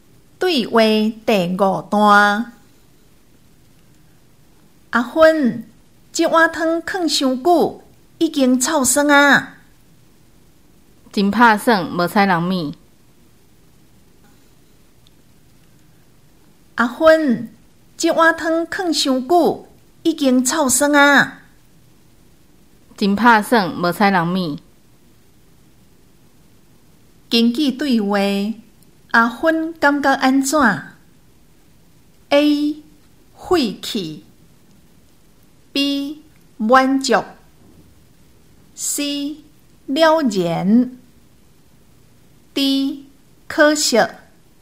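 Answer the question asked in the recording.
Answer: D: 可惜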